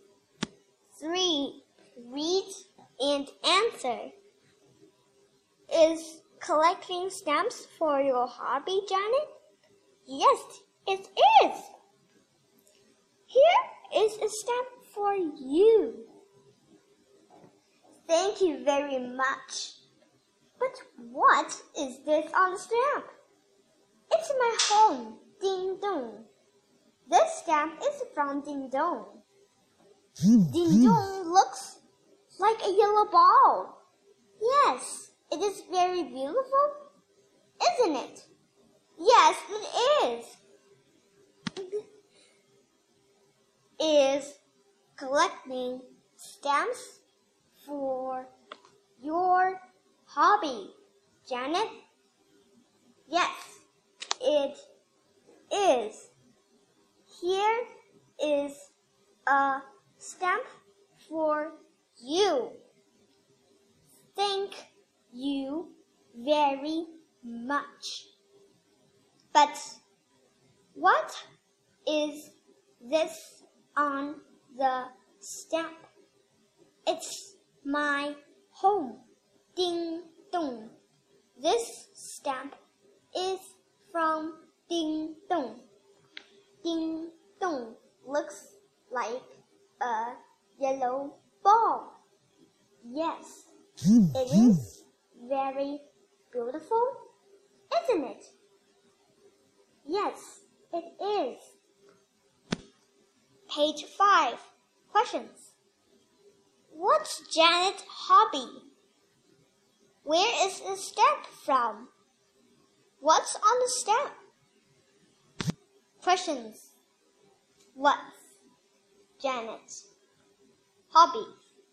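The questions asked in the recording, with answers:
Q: What's Janet's hobby?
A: Collecting stamps

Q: Where is the stamp from?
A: Ding Dong

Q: What's on the stamp?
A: Ding Dong, Janet's home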